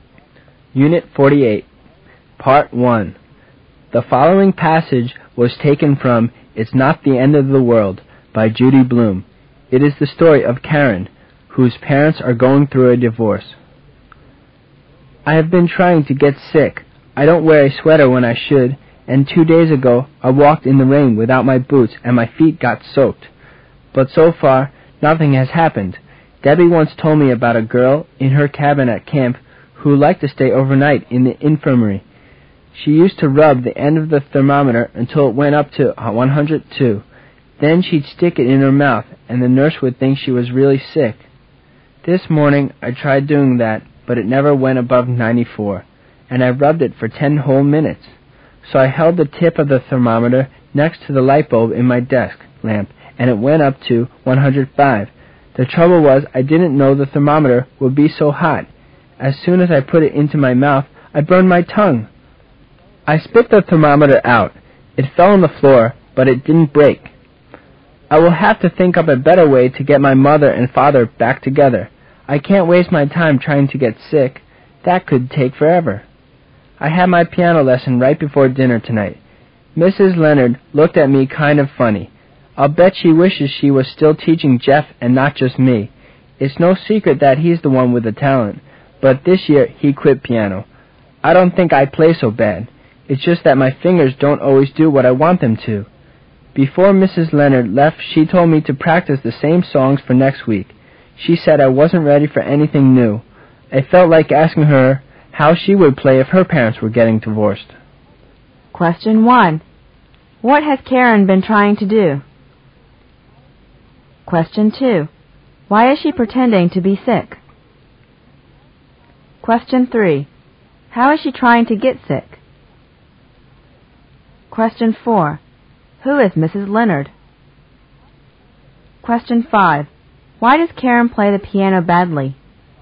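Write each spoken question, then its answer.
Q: What has Karen been trying to do?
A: Get sick

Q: Why is she pretending to be sick?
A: To get her parents back together

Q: How is she trying to get sick?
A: Not wearing a sweater and walking in the rain without boots

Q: Who is Mrs. Leonard?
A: Her piano teacher

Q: Why does Karen play the piano badly?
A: Her parents are getting divorced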